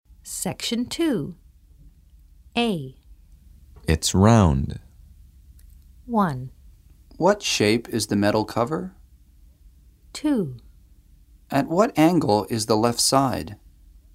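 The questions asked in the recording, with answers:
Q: It's round.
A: 1: What shape is the metal cover?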